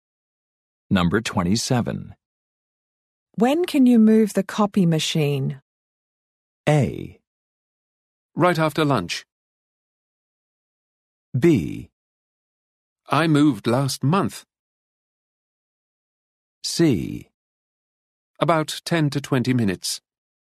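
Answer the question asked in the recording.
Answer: A: Right after lunch.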